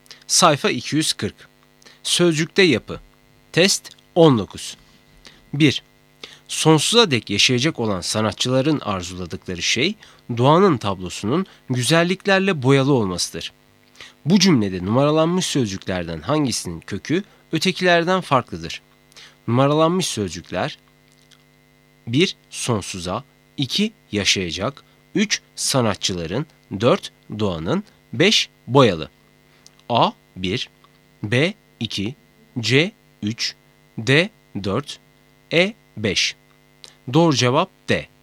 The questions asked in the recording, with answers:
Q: Bu cümlede numaralanmış sözcüklerden hangisinin kökü ötekilerden farklıdır?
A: Doğru cevap D. 4